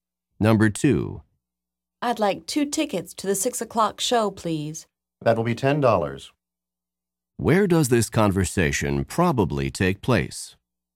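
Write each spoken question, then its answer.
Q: Where does this conversation probably take place?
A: At a theater or cinema box office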